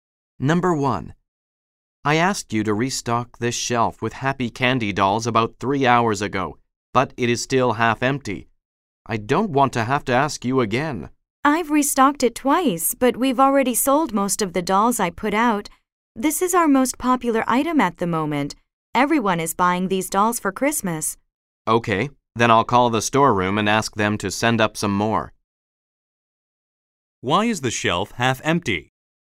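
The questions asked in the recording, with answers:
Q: Why is the shelf half empty?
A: The dolls are popular and have sold out quickly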